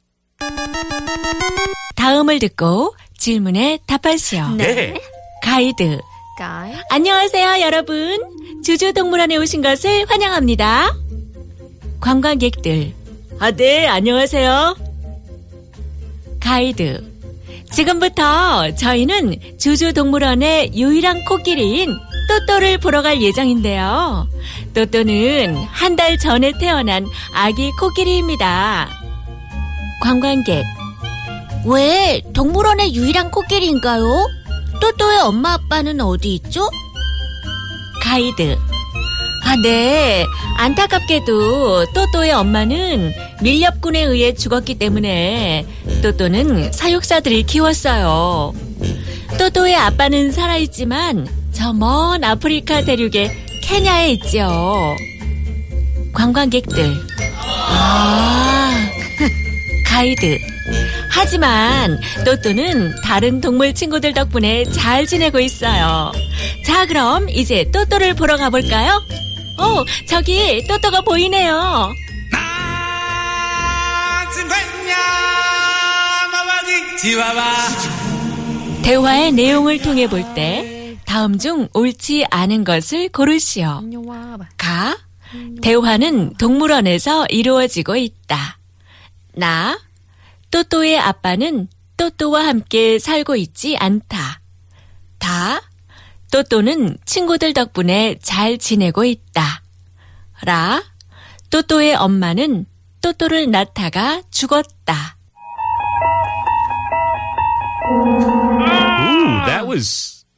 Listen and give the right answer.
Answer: Unfortunately, Toto's mom was killed by poachers.